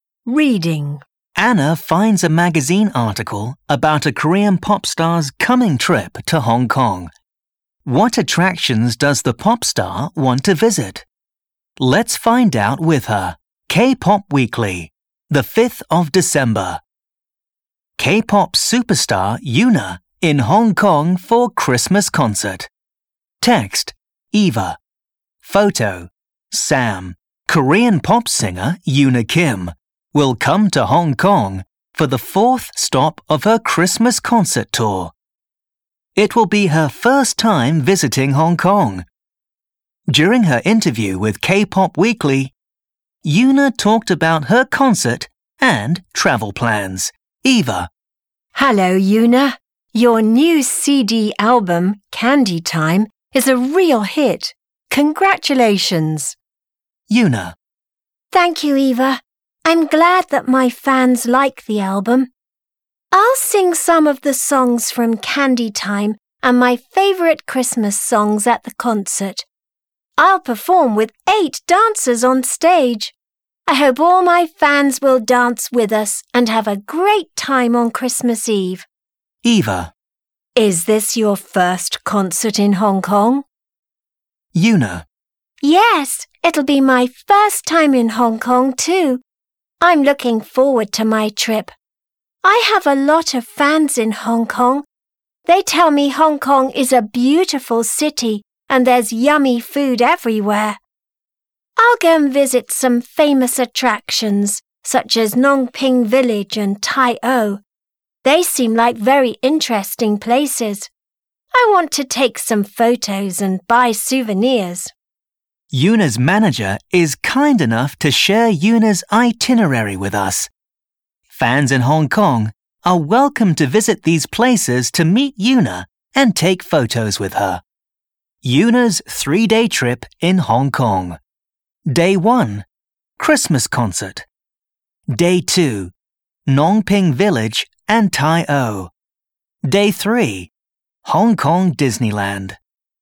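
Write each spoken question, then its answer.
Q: What attractions does the pop star want to visit?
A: Ngong Ping Village and Tai O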